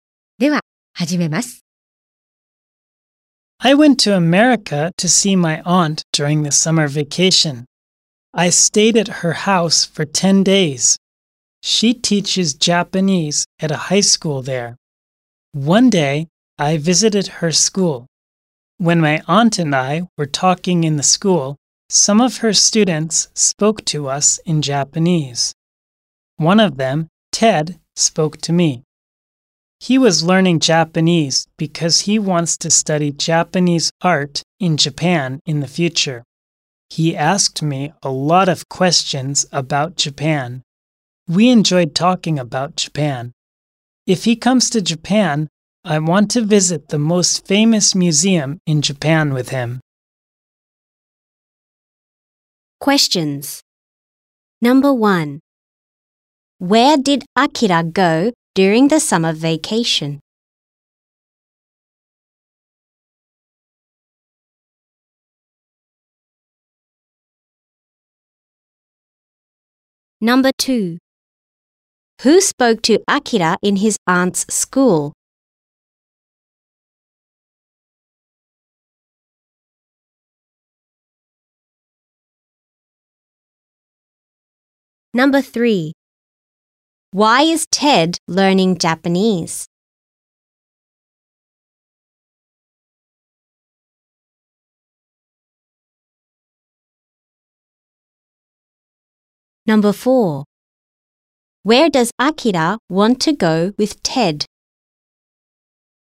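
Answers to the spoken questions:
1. To America.
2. Ted.
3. Because he wants to study Japanese art in Japan.
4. To the most famous museum in Japan.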